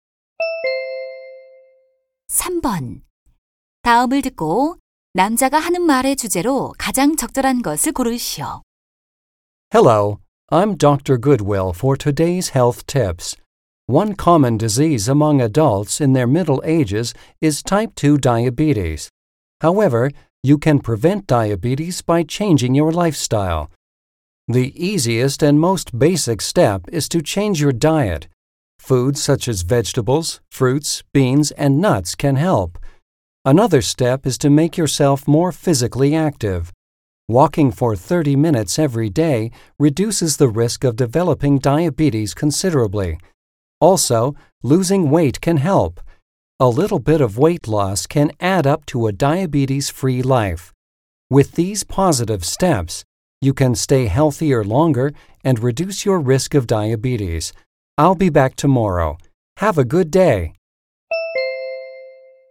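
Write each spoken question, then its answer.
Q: 다음을 듣고 남자가 하는 말의 주제로 가장 적절한 것을 고르시오.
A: 생활 습관 변화를 통한 당뇨병 예방법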